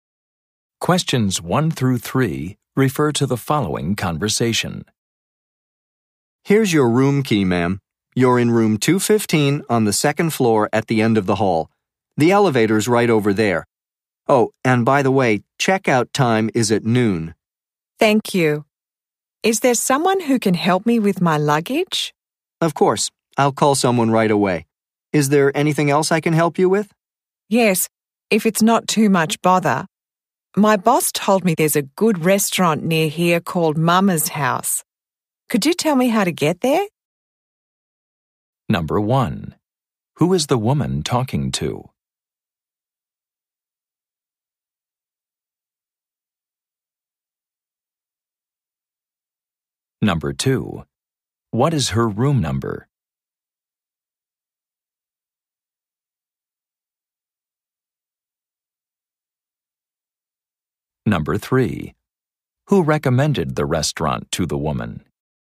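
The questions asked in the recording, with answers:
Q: Who is the woman talking to?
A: A hotel desk clerk

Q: What is her room number?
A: 215

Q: Who recommended the restaurant to the woman?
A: Her boss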